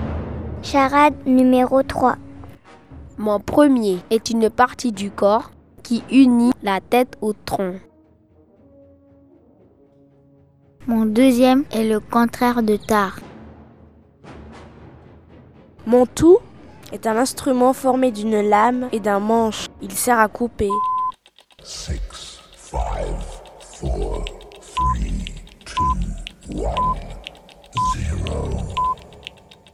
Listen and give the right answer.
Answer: un couteau.